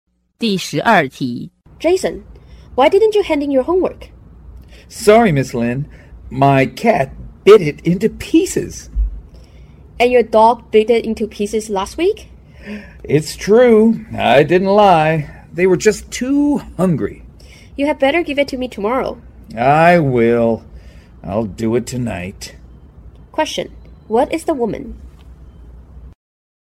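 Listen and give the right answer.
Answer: A teacher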